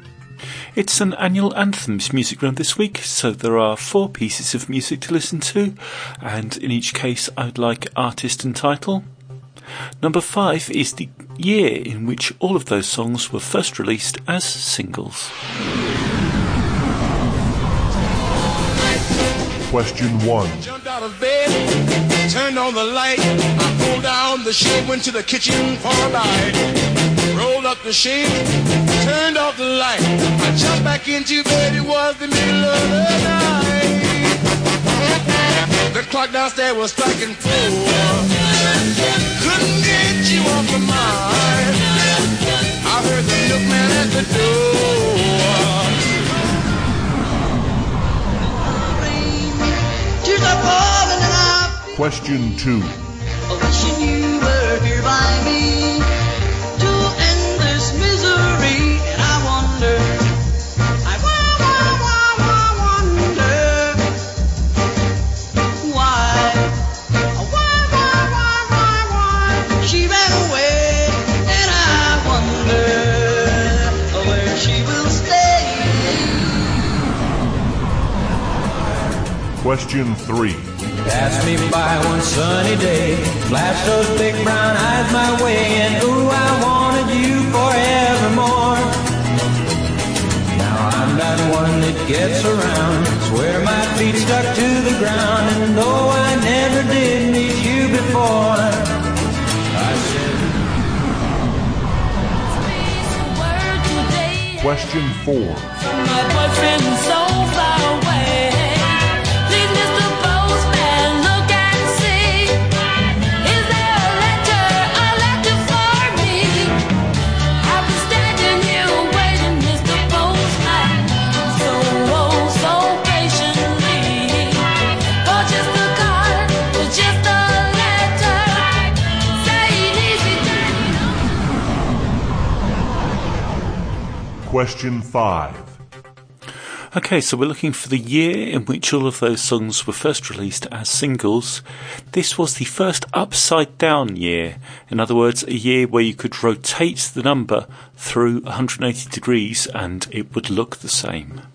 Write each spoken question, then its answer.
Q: Okay, so we're looking for the year in which all of those songs were first released as singles.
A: And number five, the year was 1961.